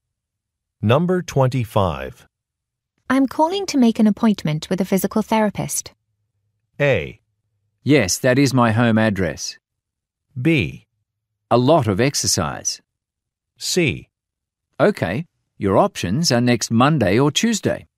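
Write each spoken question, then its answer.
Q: I'm calling to make an appointment with a physical therapist.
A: C: Okay, your options are next Monday or Tuesday.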